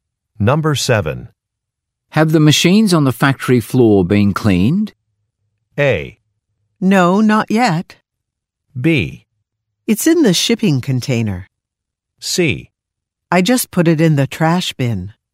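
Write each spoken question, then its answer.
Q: Have the machines on the factory floor been cleaned?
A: A: No, not yet.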